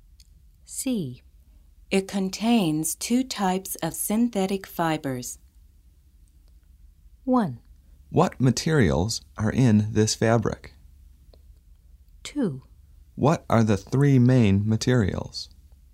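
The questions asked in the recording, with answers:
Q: It contains two types of synthetic fibers.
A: 1: What materials are in this fabric?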